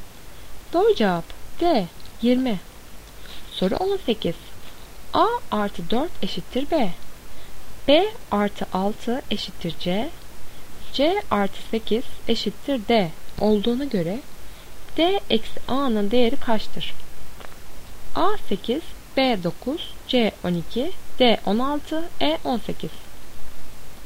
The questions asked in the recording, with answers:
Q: C artı 8 eşittir D olduğuna göre D eksi A'nın değeri kaçtır?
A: Doğru cevap E 18.